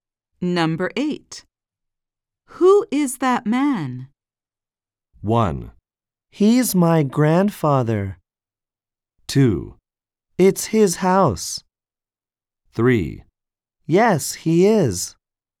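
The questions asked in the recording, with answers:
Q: Who is that man?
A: 1: He's my grandfather.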